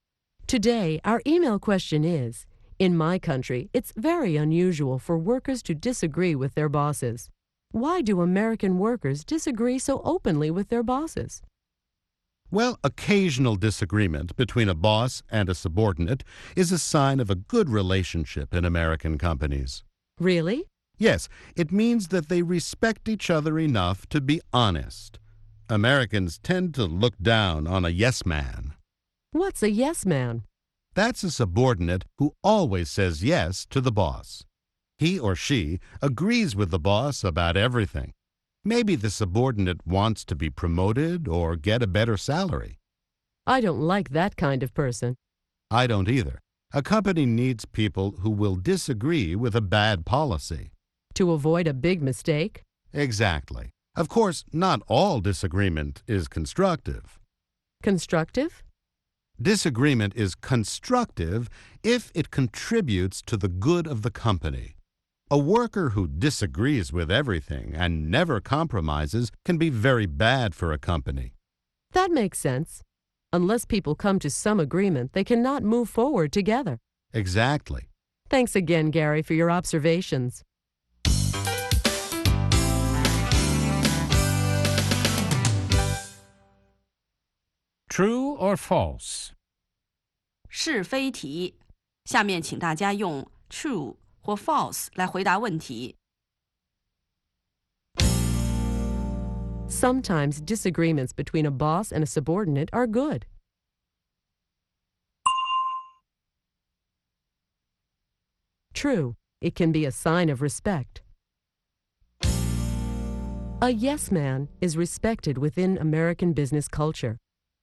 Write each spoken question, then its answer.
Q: A yes man is respected within American business culture.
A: False.Americans tend to look down on someone who always agrees with his or her boss.